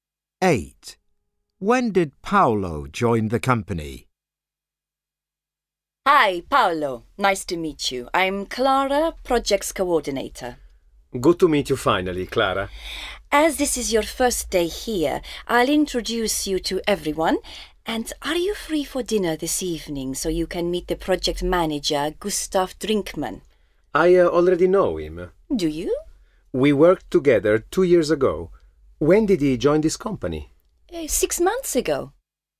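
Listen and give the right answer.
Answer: Today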